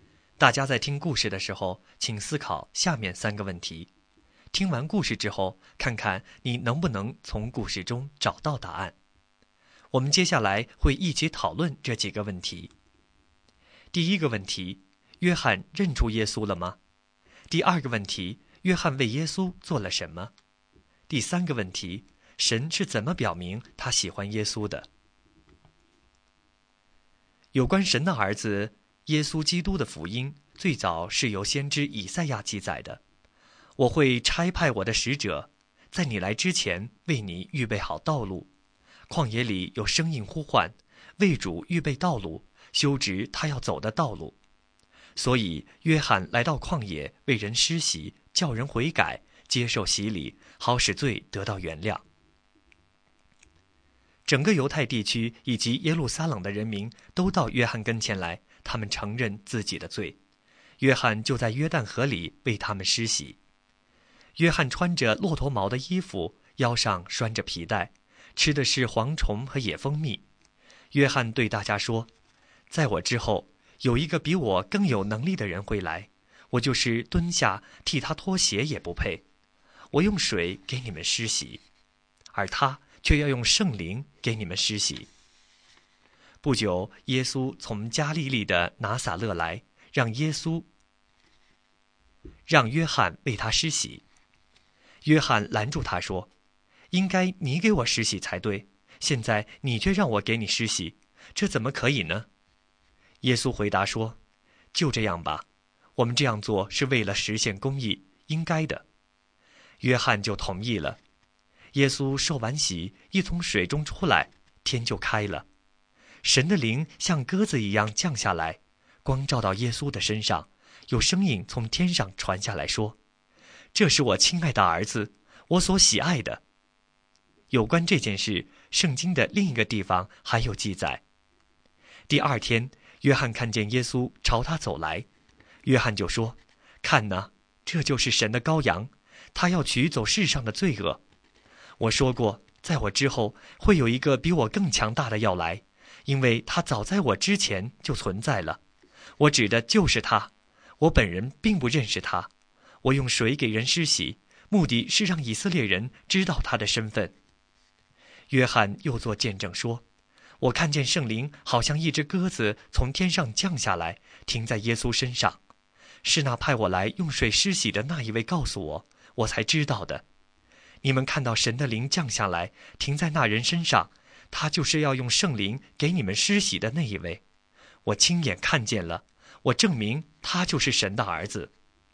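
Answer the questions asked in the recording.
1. 认出了;他看见圣灵像鸽子降在耶稣身上,作证说耶稣是神的儿子、神的羔羊
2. 为他预备道路,并在约旦河为他施洗
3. 神的灵像鸽子降在他身上,天上有声音说:这是我亲爱的儿子,我所喜爱的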